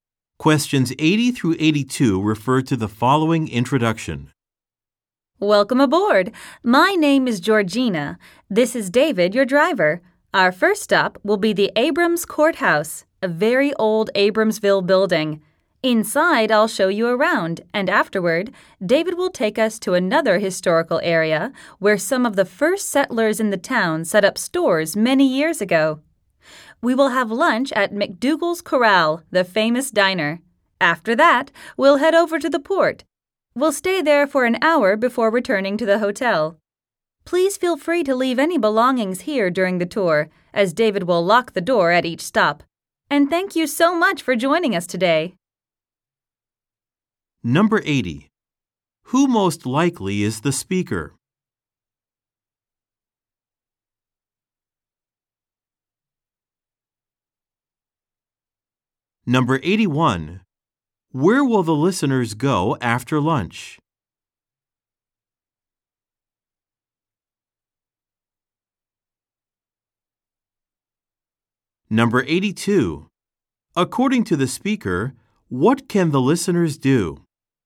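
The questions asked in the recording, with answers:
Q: Who most likely is the speaker?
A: A tour guide

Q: Where will the listeners go after lunch?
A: To the port

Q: According to the speaker, what can the listeners do?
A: Leave their belongings on the bus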